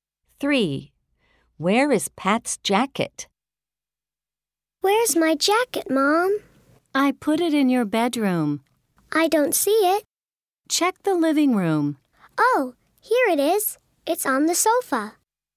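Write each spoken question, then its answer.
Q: Where is Pat's jacket?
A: On the sofa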